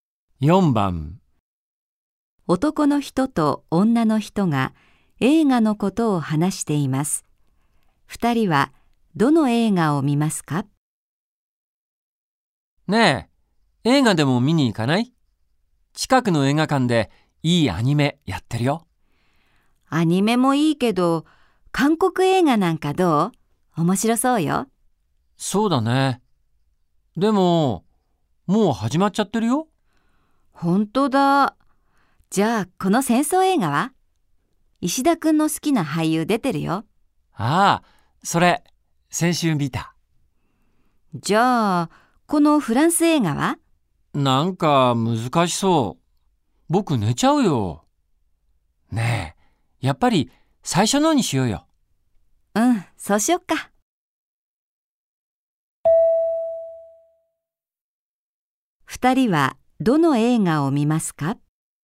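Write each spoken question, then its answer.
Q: 二人はどの映画を見ますか?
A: アニメ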